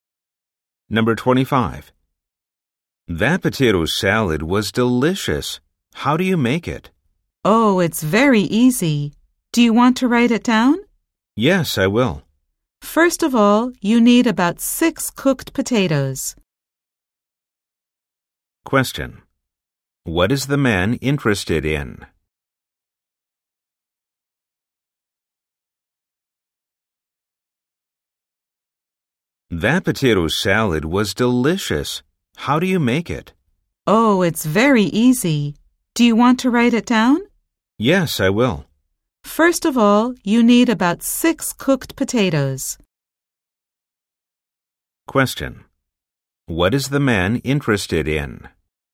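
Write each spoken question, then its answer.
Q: What is the man interested in?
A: How to make the potato salad.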